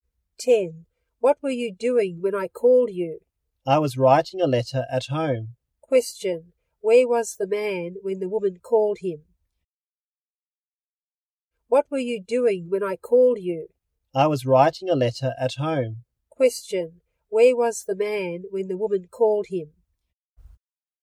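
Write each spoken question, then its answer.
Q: Question, where was the man when the woman called him?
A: At home.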